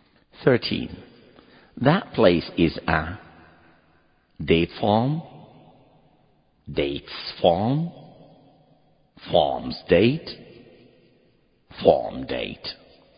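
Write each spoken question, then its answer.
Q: That place is a date farm, dates farm, farm's date, farm date.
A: A: a date farm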